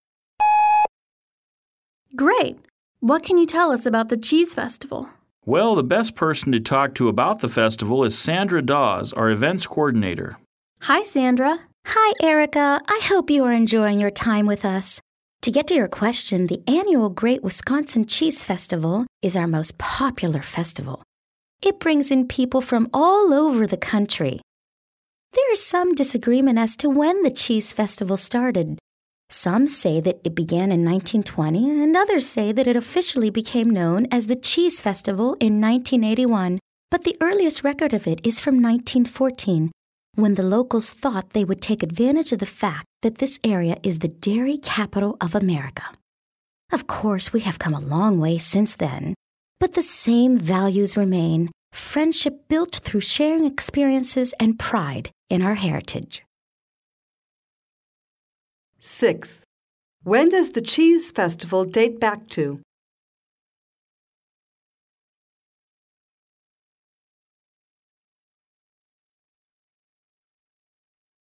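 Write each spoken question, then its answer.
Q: When does the Cheese Festival date back to?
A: 1914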